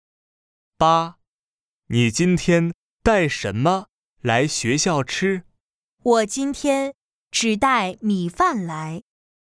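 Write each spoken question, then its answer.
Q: 你今天带什么来学校吃?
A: 米饭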